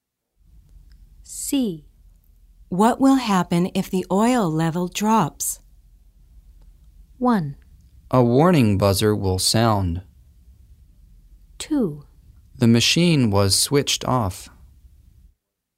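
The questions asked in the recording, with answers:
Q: What will happen if the oil level drops?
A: 1: A warning buzzer will sound.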